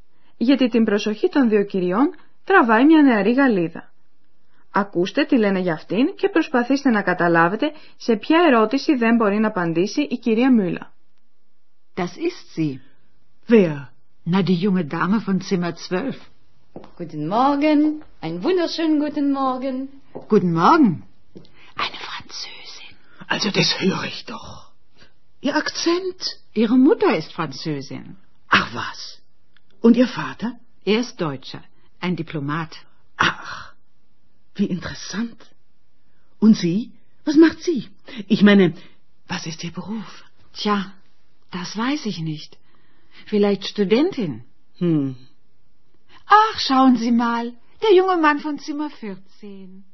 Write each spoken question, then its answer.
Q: Ακούστε τι λένε για αυτήν και προσπαθήστε να καταλάβετε σε ποια ερώτηση δεν μπορεί να απαντήσει η κυρία Μούλα.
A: Στην ερώτηση για το επάγγελμα δεν μπορεί να απαντήσει η κυρία Μούλα.